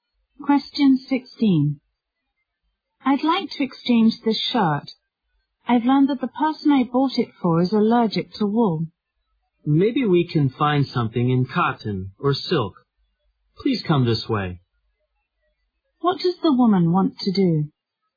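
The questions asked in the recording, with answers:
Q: What does the woman want to do?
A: Exchange the wool shirt for one in cotton or silk.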